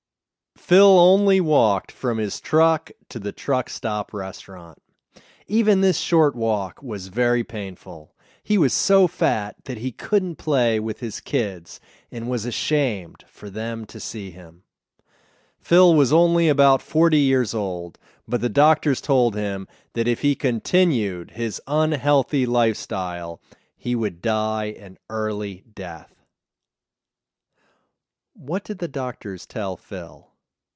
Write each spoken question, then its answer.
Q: What did the doctors tell Phil?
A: The doctors told Phil that if he continued his unhealthy lifestyle, he would die an early death.